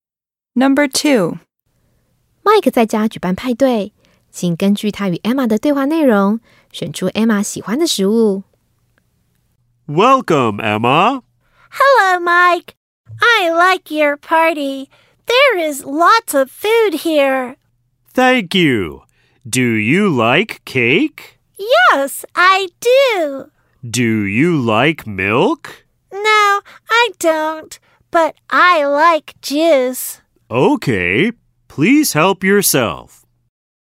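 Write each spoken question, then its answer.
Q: Mike 在家举办派对,请根据他与 Emma 的对话内容,选出 Emma 喜欢的食物。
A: 蛋糕和果汁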